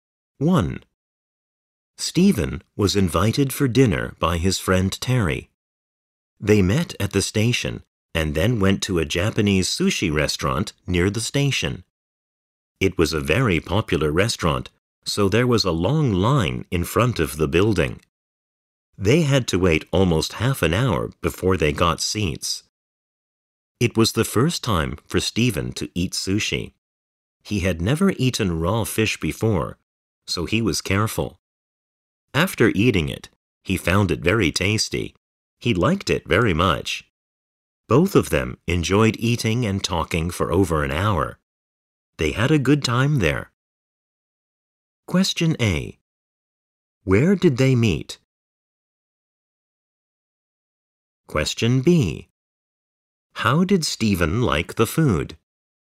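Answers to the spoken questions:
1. At the station
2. He liked it very much; he found it very tasty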